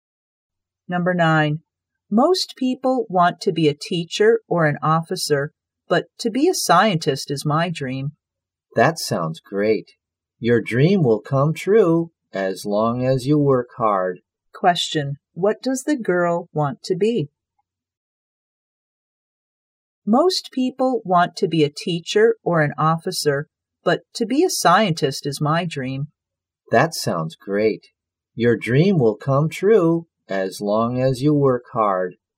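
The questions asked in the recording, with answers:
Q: What does the girl want to be?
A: A scientist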